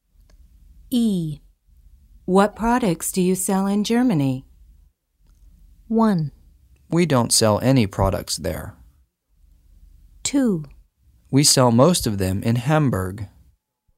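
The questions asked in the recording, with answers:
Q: What products do you sell in Germany?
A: 1: We don't sell any products there.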